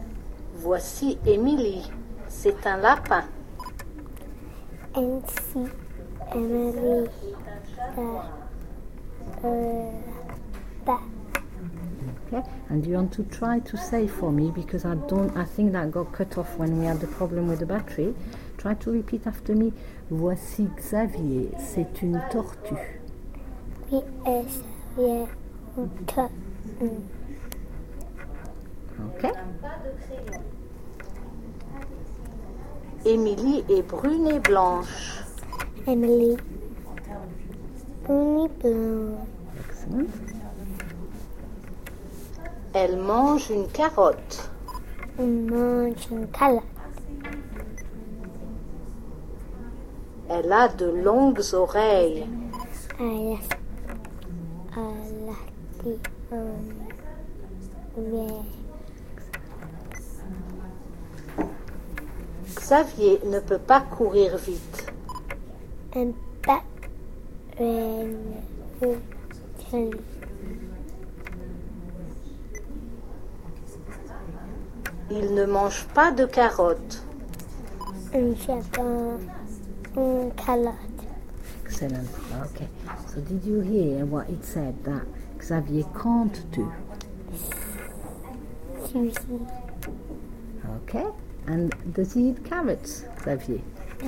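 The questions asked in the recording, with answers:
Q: So did you hear what it said that Xavier can't do?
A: Run fast

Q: And does he eat carrots, Xavier?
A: No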